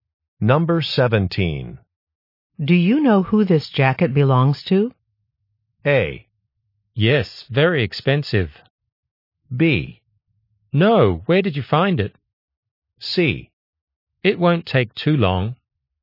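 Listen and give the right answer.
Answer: B: No, where did you find it?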